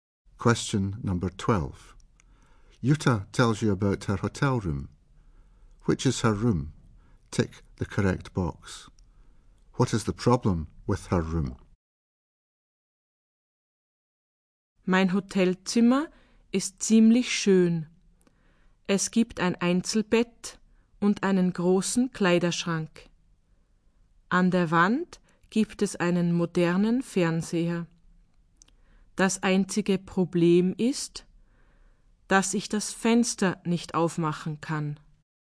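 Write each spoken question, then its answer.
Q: What is the problem with her room?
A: She can't open the window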